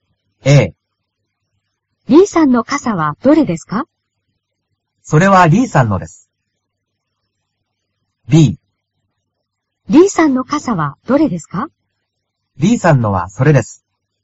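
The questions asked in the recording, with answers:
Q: D さんの傘はどれですか?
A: B: D さんのはそれです。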